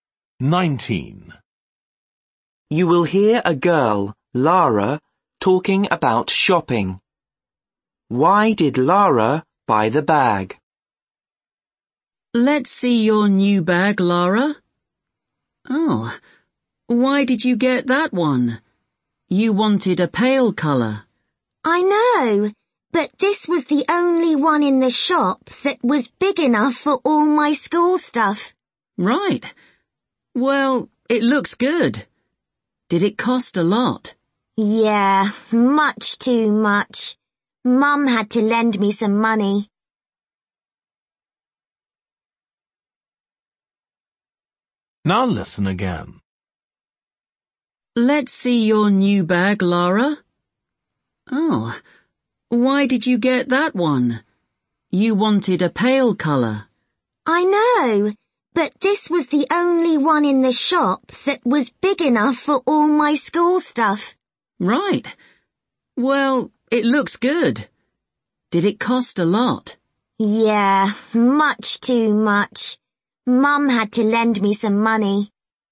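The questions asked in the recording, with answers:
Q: Why did Lara buy the bag?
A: It was the only one big enough for her school things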